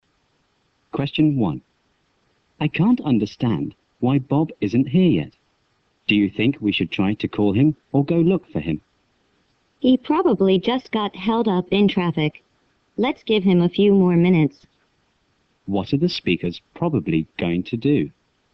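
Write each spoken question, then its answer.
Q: What are the speakers probably going to do?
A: Wait a few more minutes for Bob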